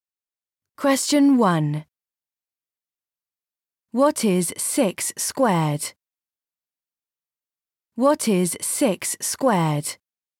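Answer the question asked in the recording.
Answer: 36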